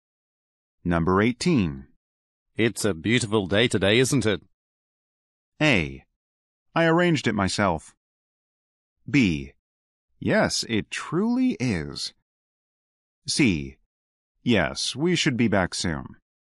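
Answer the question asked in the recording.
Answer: B: Yes, it truly is.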